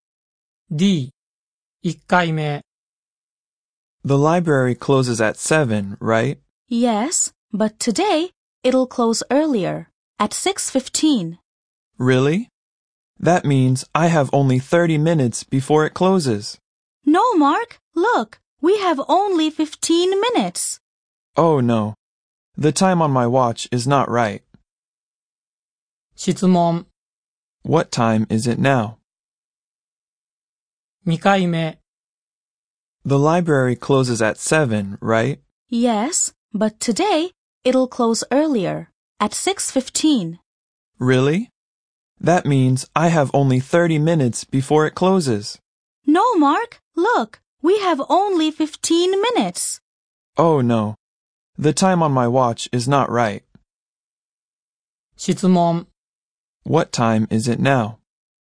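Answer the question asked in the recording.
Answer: 6:00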